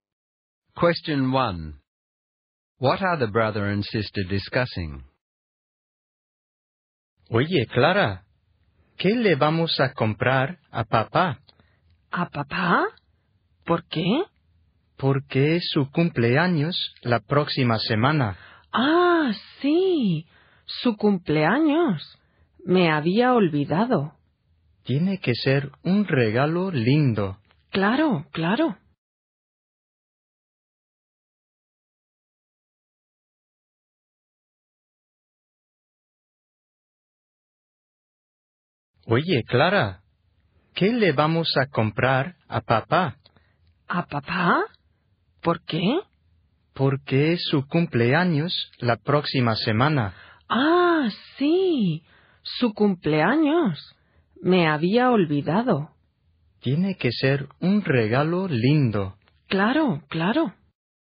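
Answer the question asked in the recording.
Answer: What present to buy their father for his birthday next week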